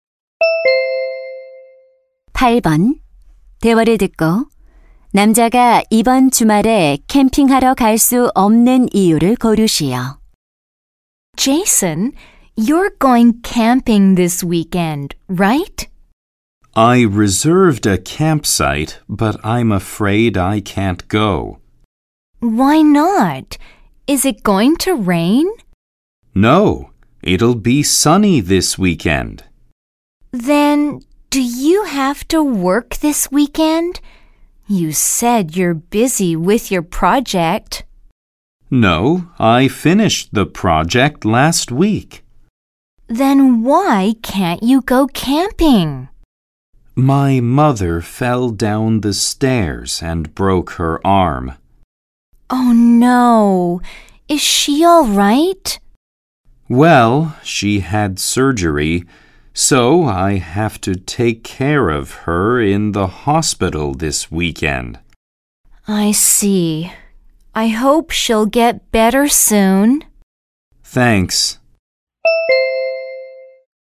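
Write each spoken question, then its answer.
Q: 대화를 듣고 남자가 이번 주말에 캠핑하러 갈 수 없는 이유를 고르시오.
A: 병원에서 팔을 다친 어머니를 돌봐야 해서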